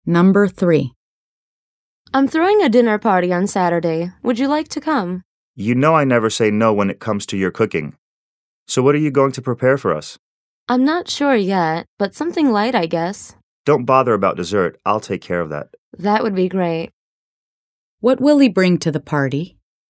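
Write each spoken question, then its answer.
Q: What will he bring to the party?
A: Dessert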